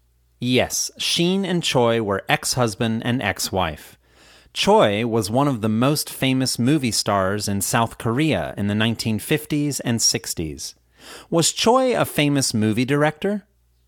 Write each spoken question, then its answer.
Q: Was Choi a famous movie director?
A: No, Choi wasn't a famous movie director.